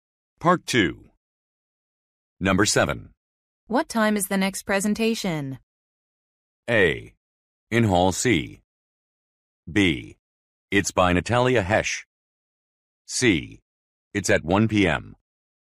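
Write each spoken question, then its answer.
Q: What time is the next presentation?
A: C: It's at 1 p.m.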